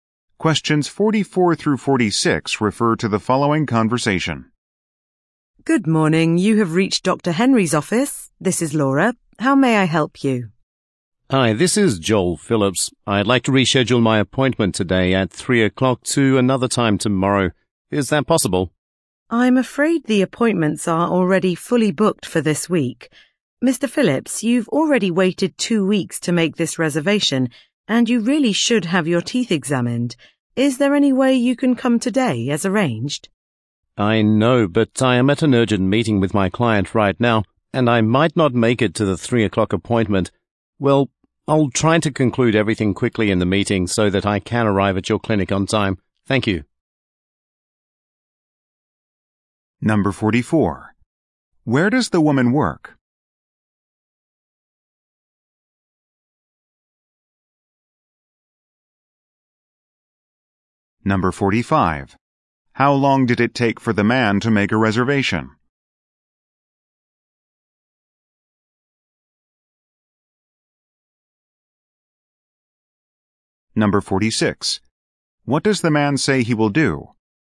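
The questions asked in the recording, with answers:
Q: Where does the woman work?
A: At a dentist's office

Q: How long did it take for the man to make a reservation?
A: 2 weeks

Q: What does the man say he will do?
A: Finish his meeting quickly to arrive on time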